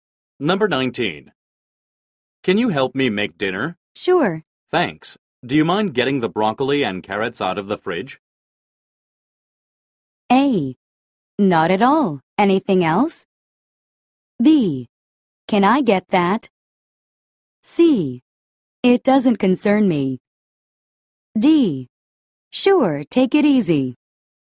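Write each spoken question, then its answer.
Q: Thanks. Do you mind getting the broccoli and carrots out of the fridge?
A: A: Not at all. Anything else?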